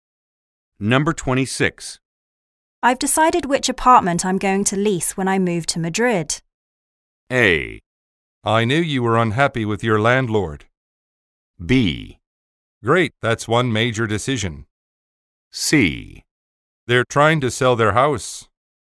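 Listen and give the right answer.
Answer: B: Great, that's one major decision.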